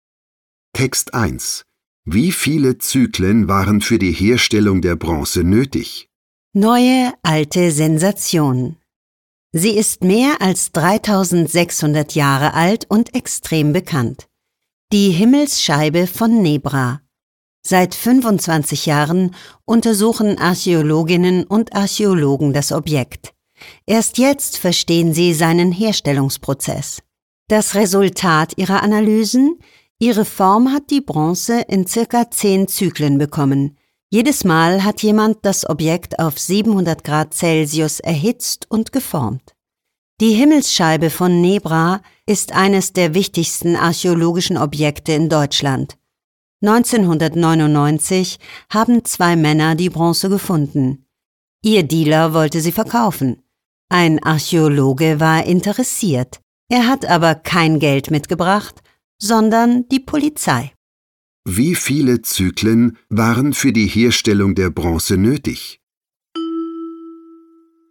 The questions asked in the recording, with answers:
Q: Wie viele Zyklen waren für die Herstellung der Bronze nötig?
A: Für die Herstellung der Himmelsscheibe waren ca.